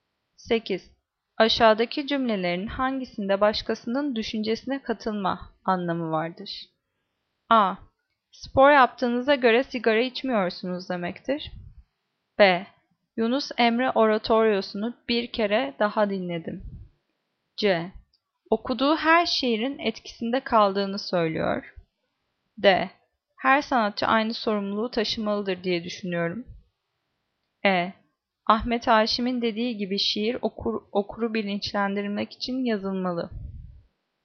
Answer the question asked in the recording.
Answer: Cevap E. Ahmet Haşim'in dediği gibi şiir okuru bilinçlendirmek için yazılmalı.